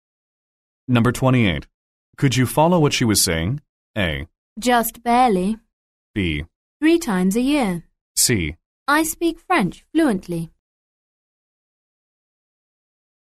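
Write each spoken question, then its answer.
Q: Could you follow what she was saying?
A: A: Just barely.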